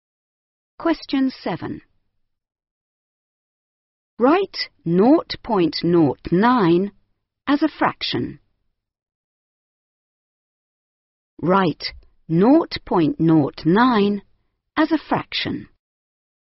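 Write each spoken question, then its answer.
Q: Write 0.09 as a fraction.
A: 9/100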